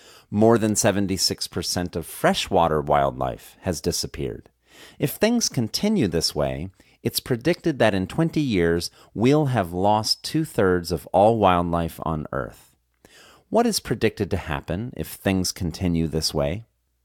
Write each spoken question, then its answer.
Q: What is predicted to happen if things continue this way?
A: If things continue this way, it's predicted that in 20 years, we'll have lost two-thirds of all wildlife on Earth.